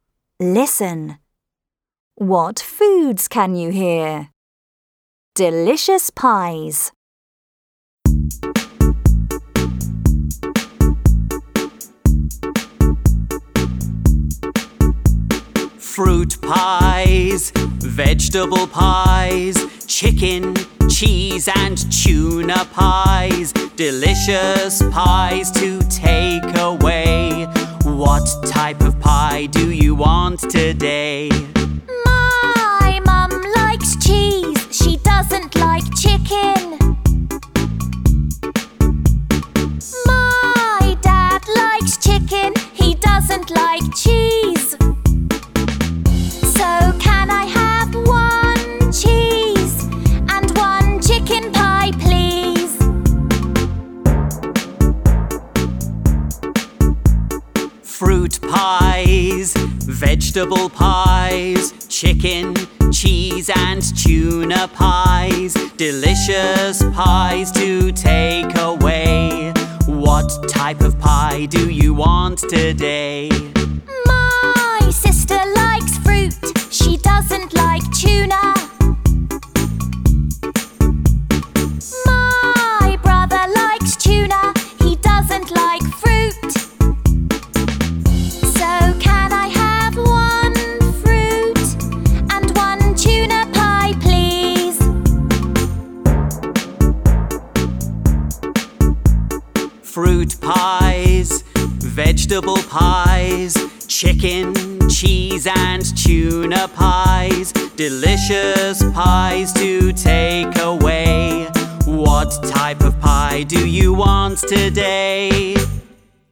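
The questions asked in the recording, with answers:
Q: What foods can you hear?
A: Pies: fruit, vegetable, chicken, cheese and tuna pies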